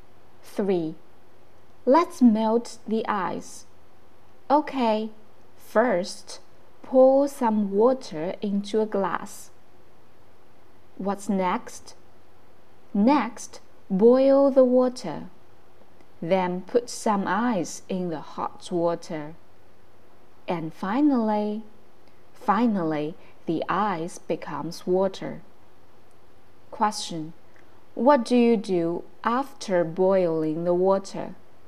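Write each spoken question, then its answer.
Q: What do you do after boiling the water?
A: Put some ice in the hot water.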